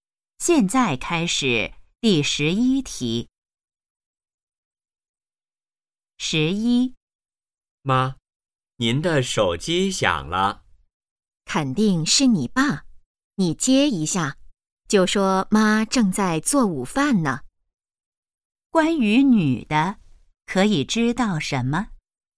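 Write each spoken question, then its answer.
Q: 关于女的,可以知道什么?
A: 她正在做午饭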